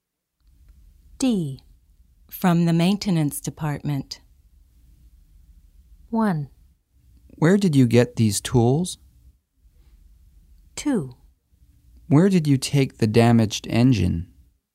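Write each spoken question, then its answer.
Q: From the maintenance department.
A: 1: Where did you get these tools?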